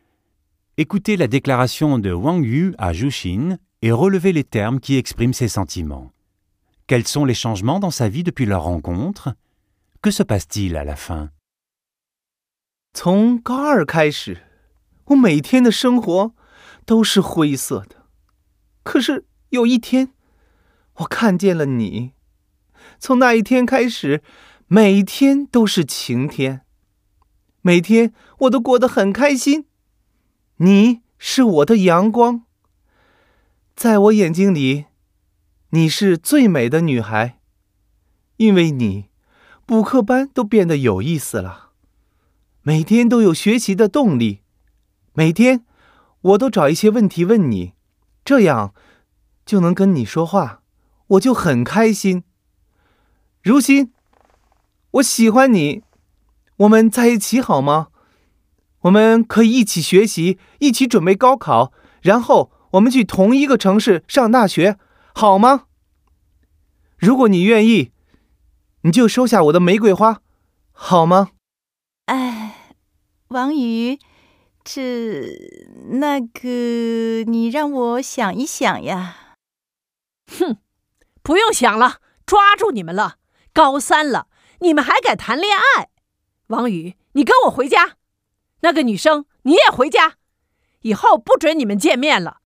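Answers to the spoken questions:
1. Sa vie n'est plus grise : chaque jour est ensoleillé, il est heureux, et les cours de soutien sont devenus intéressants et lui donnent envie d'étudier.
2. Zhu Xin veut réfléchir, mais un parent les surprend, ramène Wang Yu à la maison et leur interdit de se revoir.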